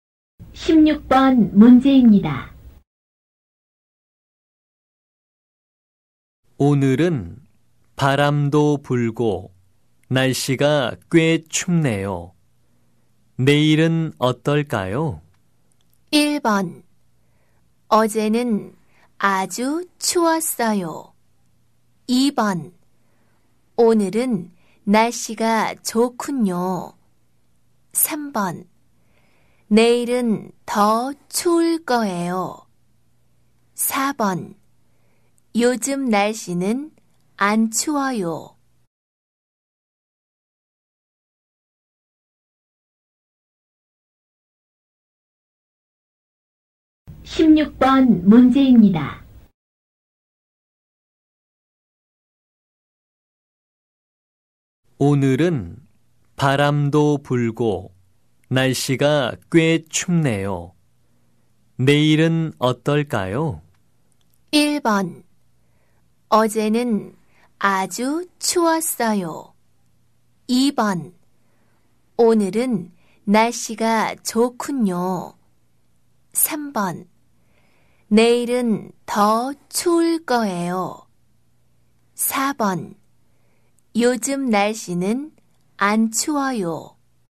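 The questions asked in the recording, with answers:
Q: 오늘은 바람도 불고 날씨가 꽤 춥네요. 내일은 어떨까요?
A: 3: 내일은 더 추울 거예요.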